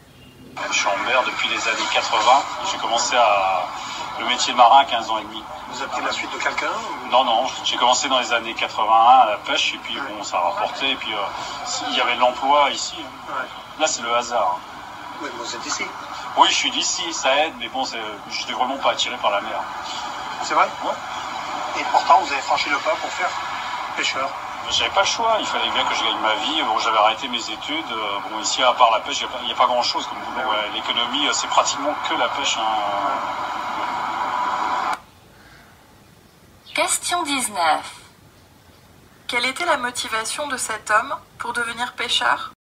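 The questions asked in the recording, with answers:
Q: Quelle était la motivation de cet homme pour devenir pêcheur ?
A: Gagner sa vie : il n'y avait pas d'autre travail que la pêche ici.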